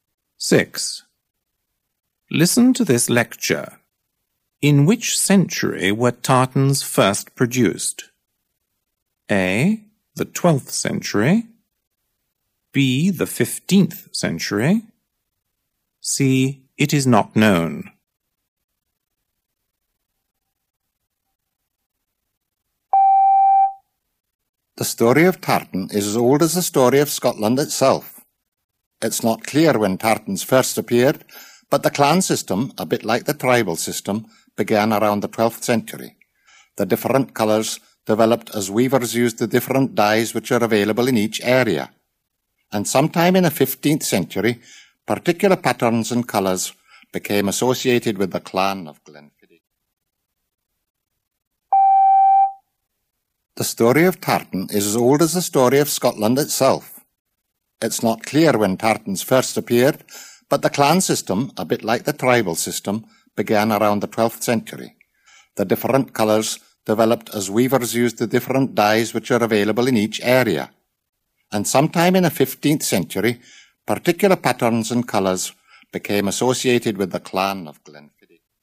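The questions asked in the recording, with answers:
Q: In which century were tartans first produced?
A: C: It is not known.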